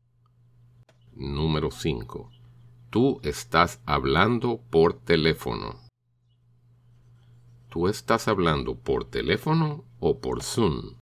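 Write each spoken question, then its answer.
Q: ¿Tú estás hablando por teléfono o por Zoom?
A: Yo estoy hablando por teléfono.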